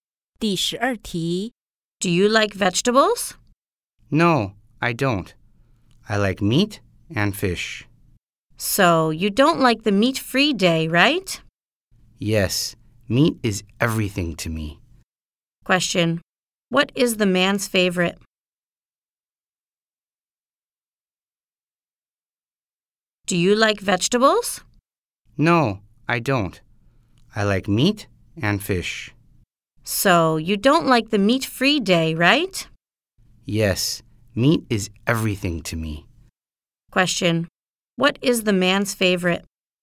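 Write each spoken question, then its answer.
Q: what is the man's favorite?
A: Meat (and fish)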